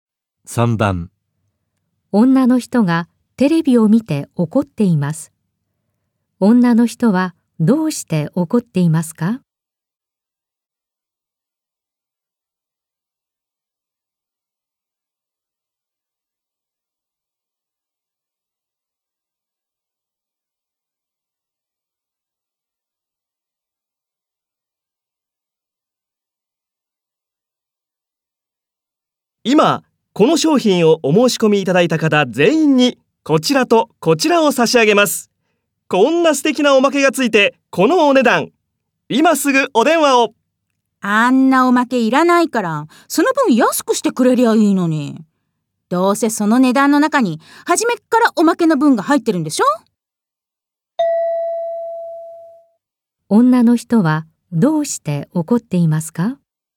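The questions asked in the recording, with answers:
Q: 女の人はどうして怒っていますか?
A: いらないおまけの分が初めから値段に入っていて、その分安くしてくれないから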